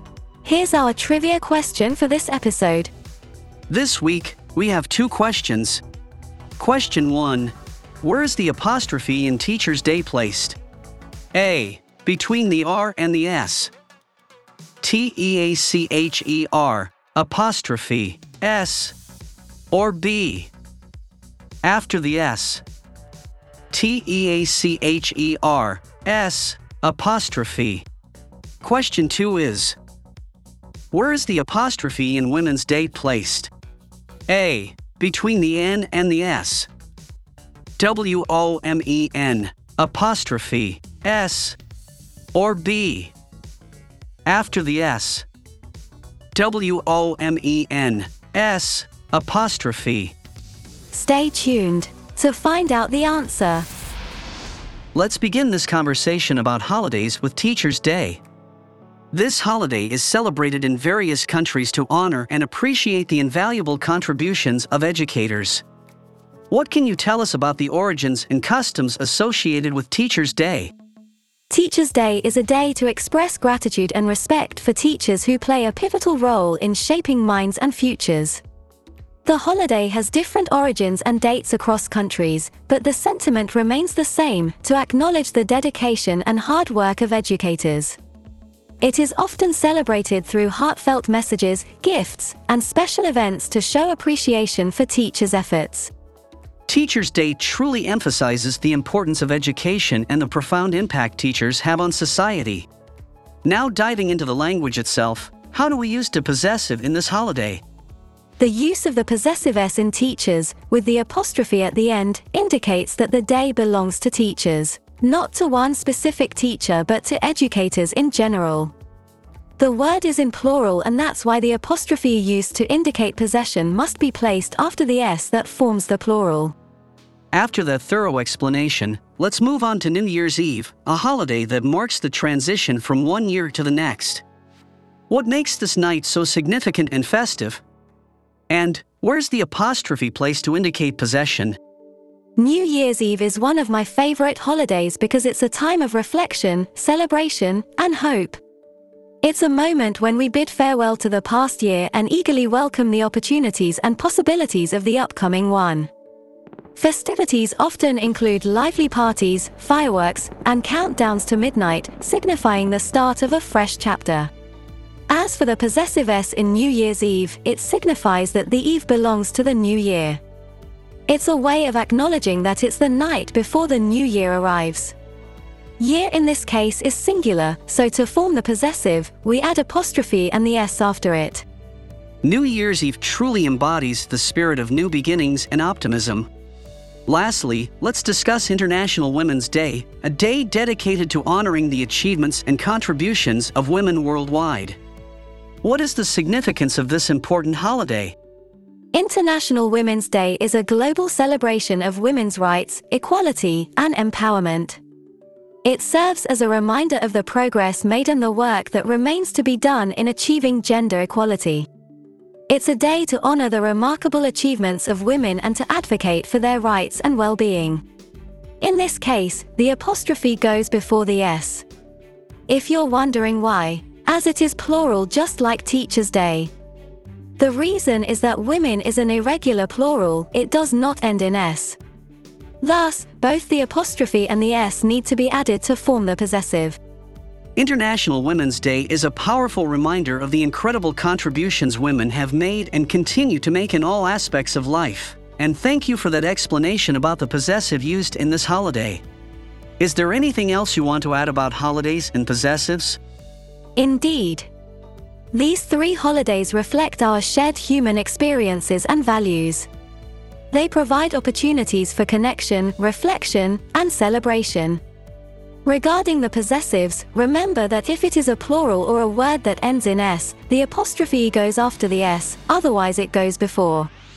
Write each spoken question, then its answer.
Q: where is the apostrophe in Teacher's Day placed?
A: B. It is after the S, because it is plural.

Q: Where is the apostrophe in Women's Day placed?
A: And the answer is A.